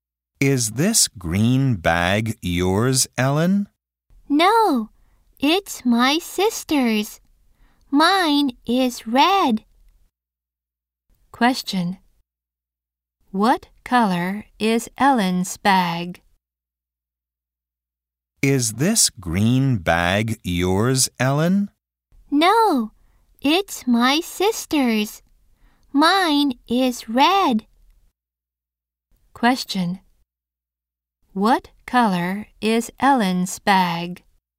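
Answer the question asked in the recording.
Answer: Red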